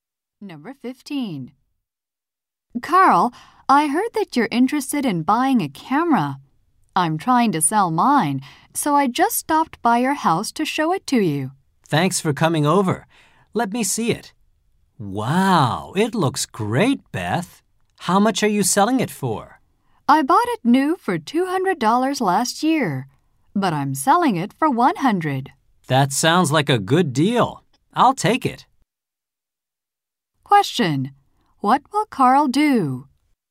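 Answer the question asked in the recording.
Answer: Buy Beth's camera for $100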